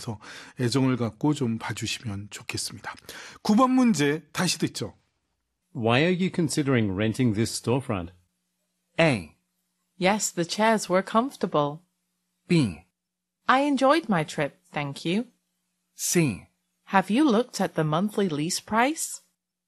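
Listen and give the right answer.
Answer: C: Have you looked at the monthly lease price?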